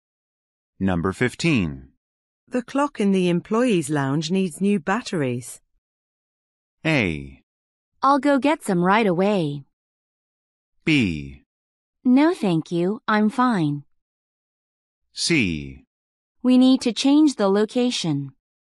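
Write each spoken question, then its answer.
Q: The clock in the employees' lounge needs new batteries.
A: A: I'll go get some right away.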